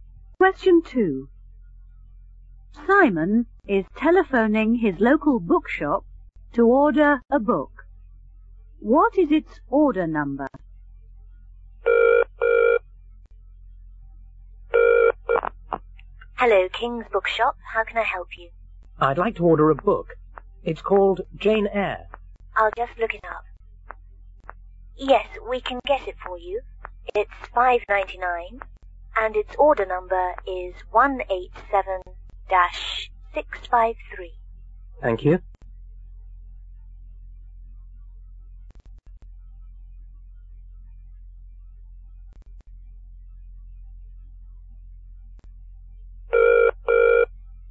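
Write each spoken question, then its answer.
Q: What is its order number?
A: 187-653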